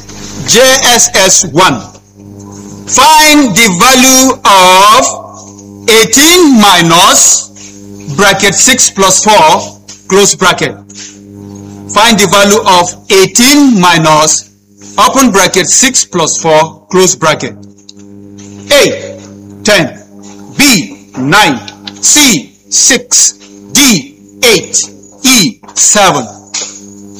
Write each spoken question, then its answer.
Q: Find the value of 18 minus bracket 6 plus 4, close bracket.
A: D, 8. A round of applause.